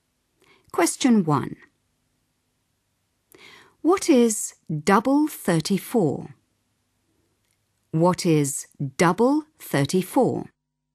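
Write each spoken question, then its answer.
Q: What is double 34?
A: 68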